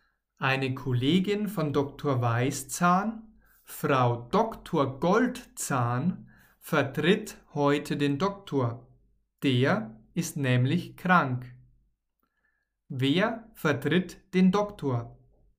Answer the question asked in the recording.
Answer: Eine Kollegin. Eine Kollegin von Dr.